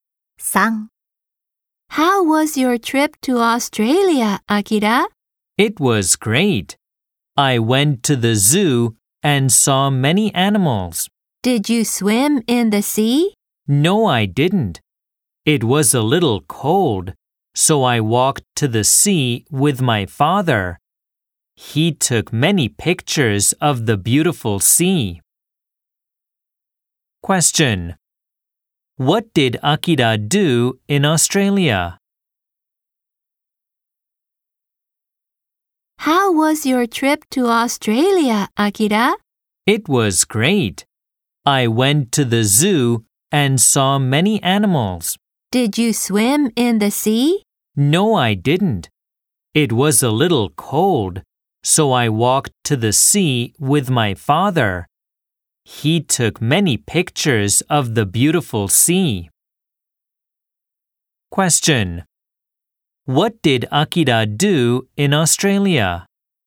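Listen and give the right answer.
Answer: He went to the zoo, saw many animals, and walked to the sea with his father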